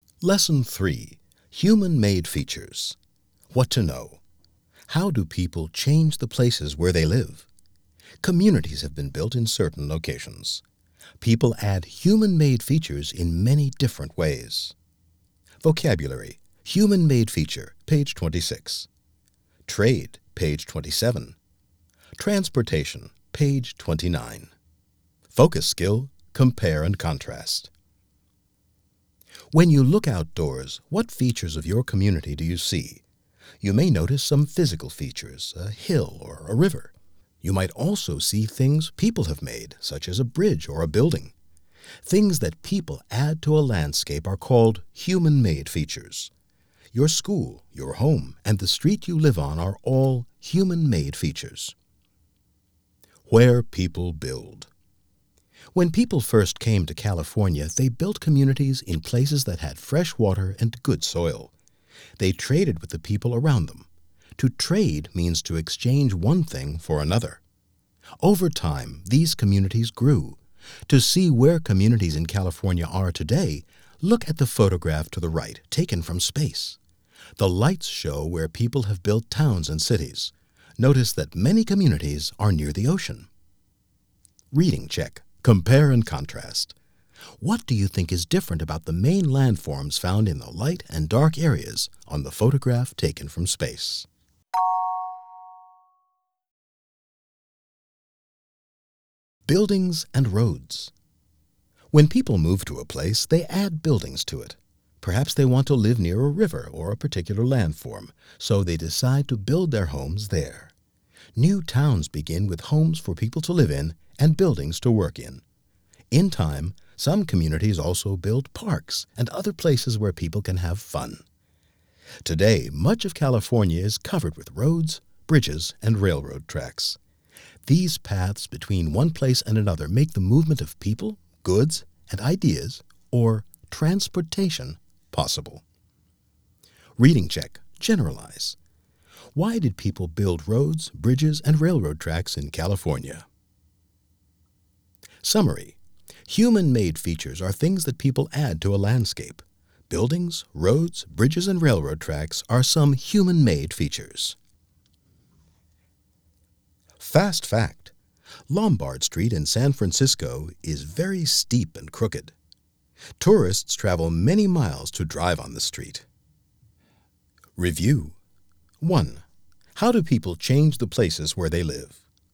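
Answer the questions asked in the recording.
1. To make transportation, the movement of people, goods, and ideas, possible
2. They add human-made features such as buildings, roads, bridges, and railroad tracks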